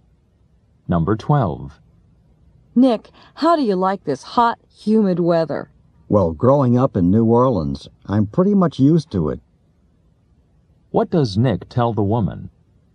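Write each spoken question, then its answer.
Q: What does Nick tell the woman?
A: He is used to hot, humid weather because he grew up in New Orleans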